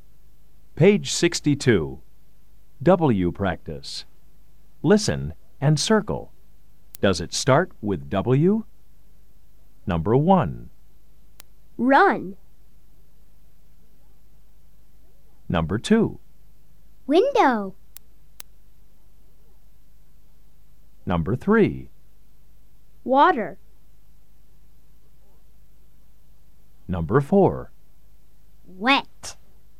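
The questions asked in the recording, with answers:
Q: Does it start with W?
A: No (run)

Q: Does it start with W?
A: Yes (window)

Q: Does it start with W?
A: Yes (water)

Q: Does it start with W?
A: Yes (wet)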